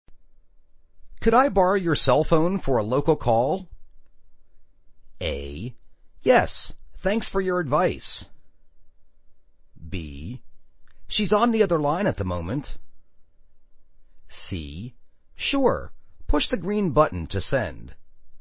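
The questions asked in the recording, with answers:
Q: Could I borrow your cell phone for a local call?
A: C: Sure, push the green button to send.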